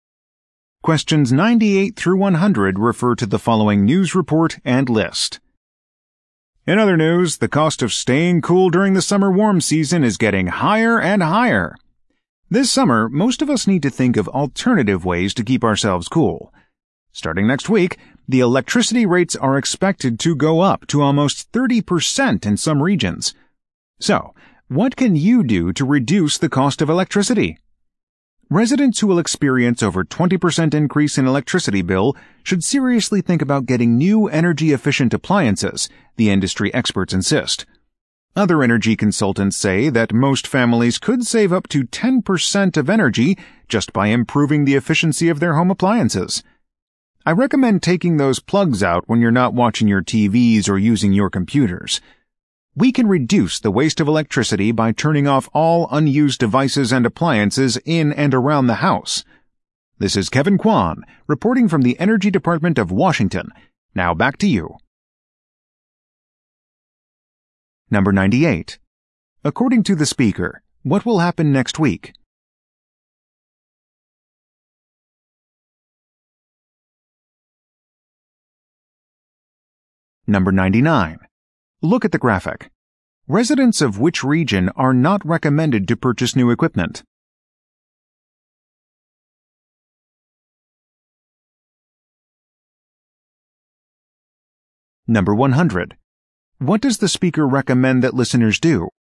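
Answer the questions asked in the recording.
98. Electricity rates will go up
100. Unplug unused devices and appliances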